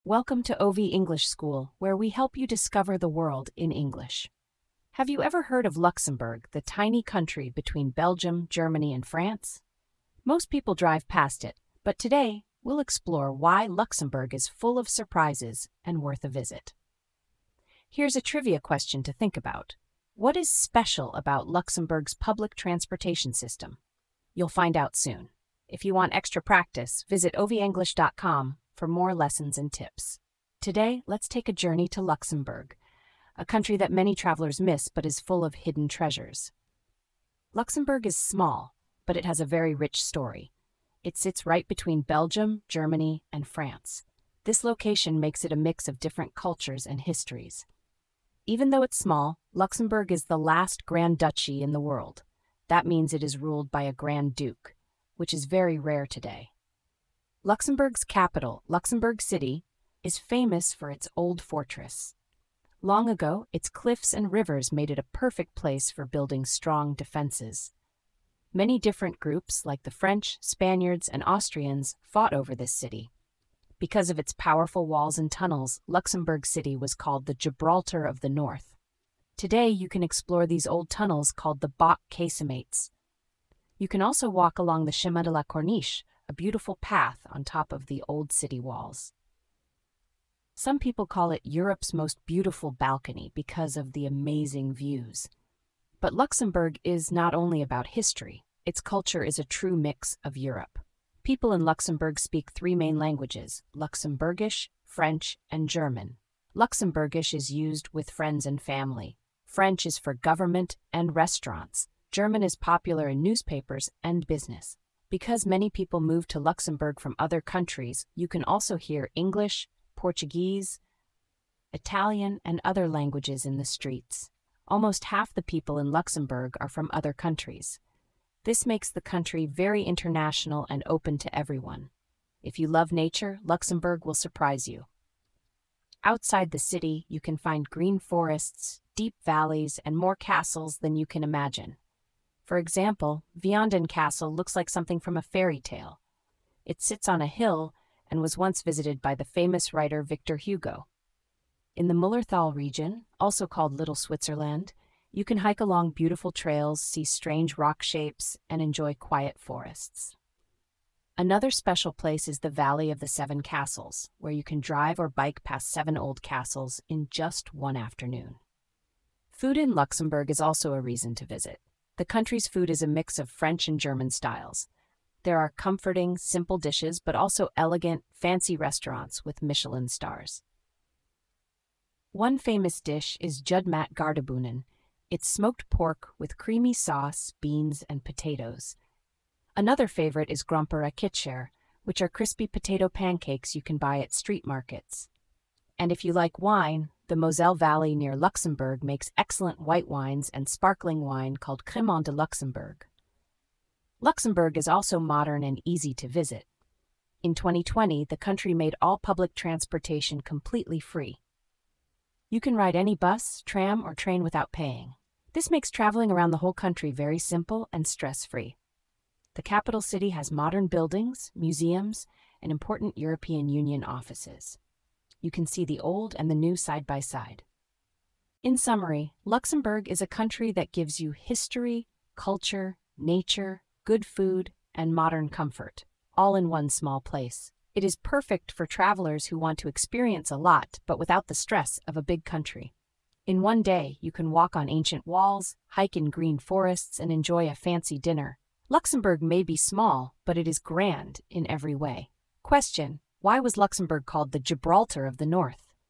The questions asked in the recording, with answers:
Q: What is special about Luxembourg's public transportation system?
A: Luxembourg's public transportation is completely free for everyone.

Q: why was Luxembourg called the Gibraltar of the North?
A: because its strong fortress and natural cliffs made it very hard to attack.